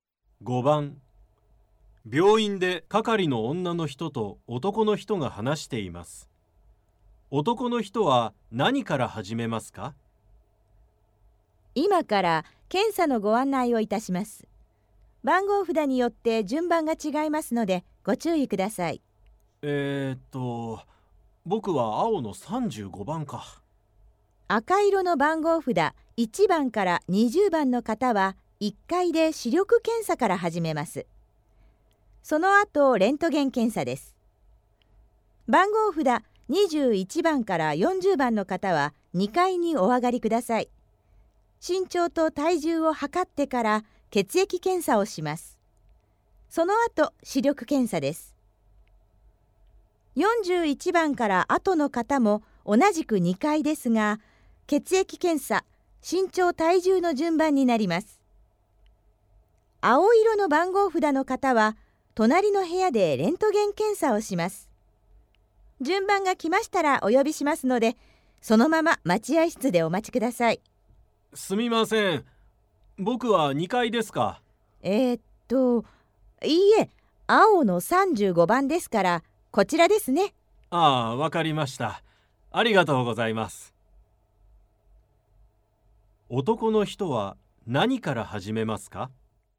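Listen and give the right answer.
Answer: レントゲン検査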